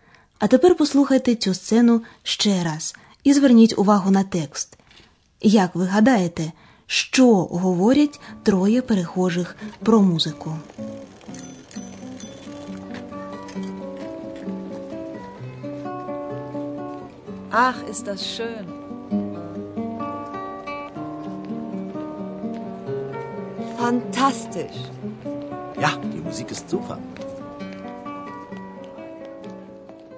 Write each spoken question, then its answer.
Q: Як ви гадаєте, що говорять троє перехожих про музику?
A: Усі троє у захваті від музики.